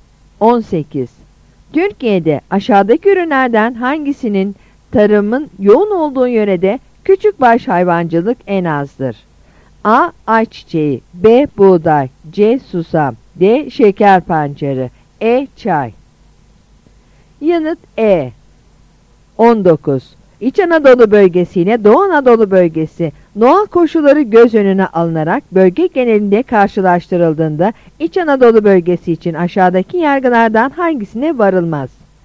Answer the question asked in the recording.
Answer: Yanıt E.